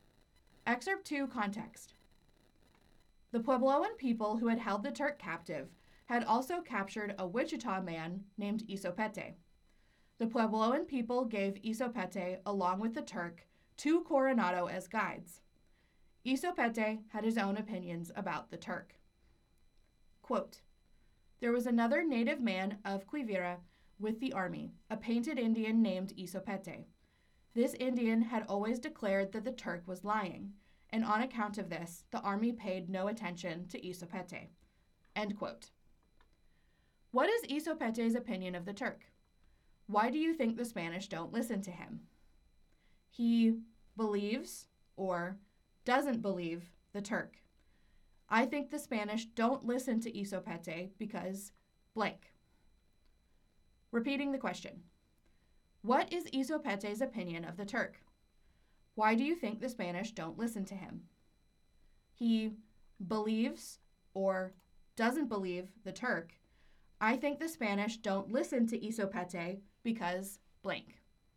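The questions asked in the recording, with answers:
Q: What is Isopete's opinion of the Turk?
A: He doesn't believe the Turk; he says the Turk is lying.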